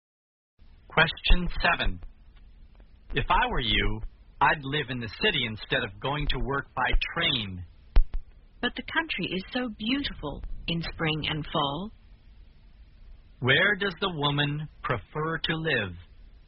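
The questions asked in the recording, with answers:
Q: Where does the woman prefer to live?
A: In the country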